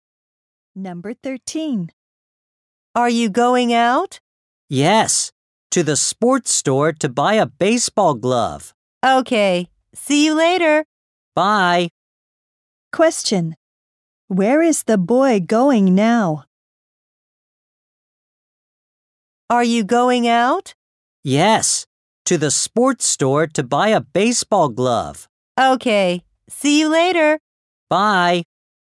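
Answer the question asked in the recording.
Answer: To the sports store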